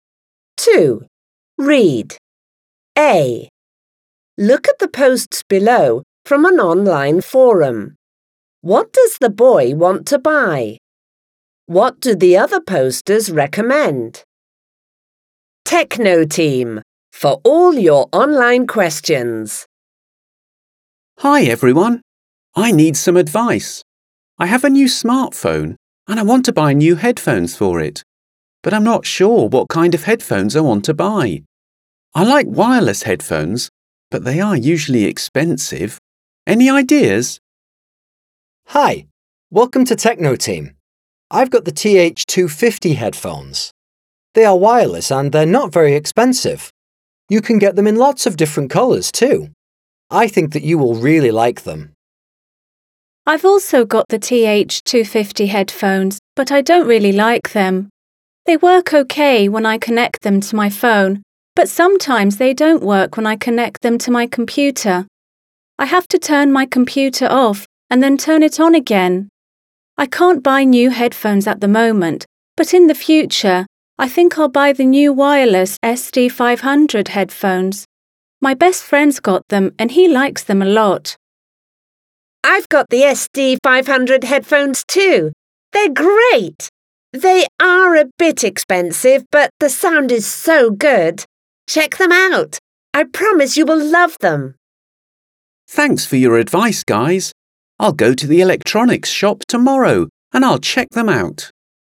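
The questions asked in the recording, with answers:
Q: What does the boy want to buy?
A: New (wireless) headphones for his new smartphone

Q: What do the other posters recommend?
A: The TH250 headphones and the SD500 headphones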